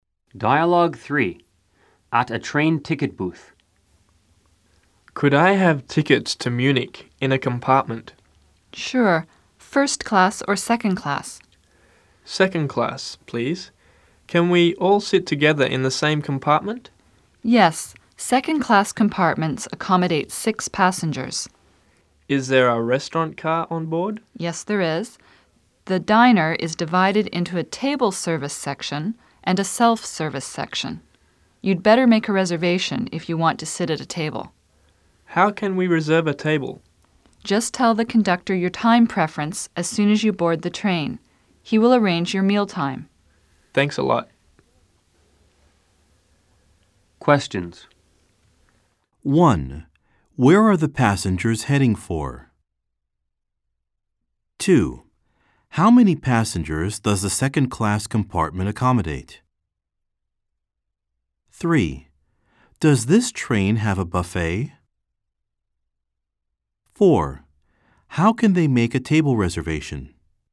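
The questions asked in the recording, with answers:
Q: Where are the passengers heading for?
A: Munich

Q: Does this train have a buffet?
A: Yes, a diner with table service and self-service sections

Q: How can they make a table reservation?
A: Tell the conductor their time preference as soon as they board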